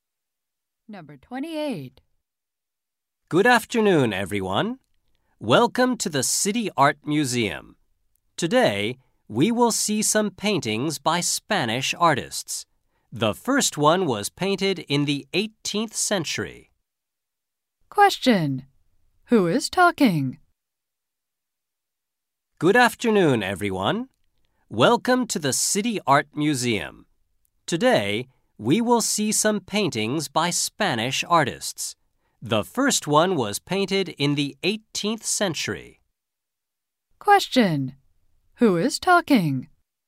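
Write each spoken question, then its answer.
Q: Who is talking?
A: A museum guide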